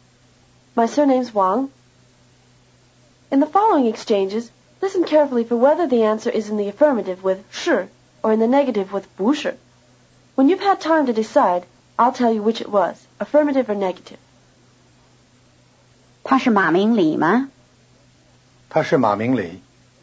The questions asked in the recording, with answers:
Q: listen carefully for whether the answer is in the affirmative with 是 or in the negative with 不是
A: Affirmative.